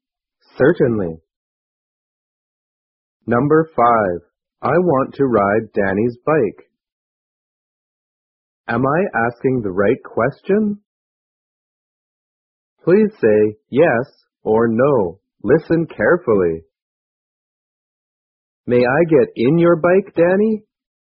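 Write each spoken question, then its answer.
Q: Am I asking the right question?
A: No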